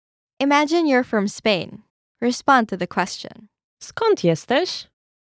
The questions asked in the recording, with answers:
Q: Skąd jesteś?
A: Jestem z Hiszpanii.